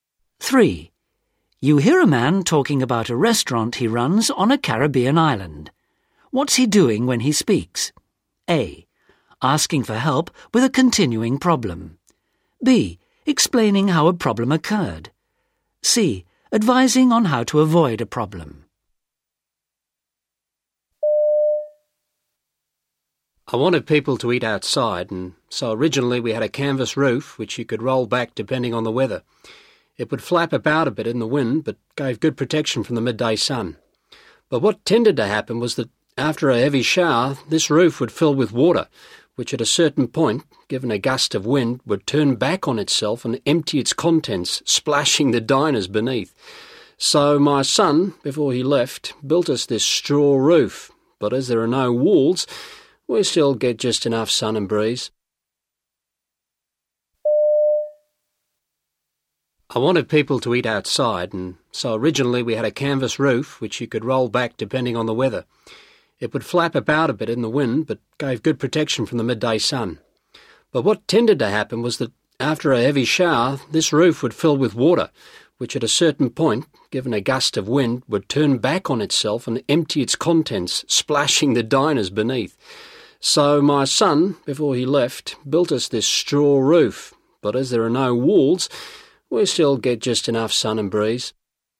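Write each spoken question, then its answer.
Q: What's he doing when he speaks?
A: B: Explaining how a problem occurred.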